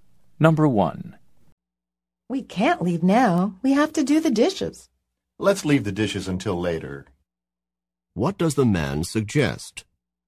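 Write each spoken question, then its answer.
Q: What does the man suggest?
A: Doing the dishes later.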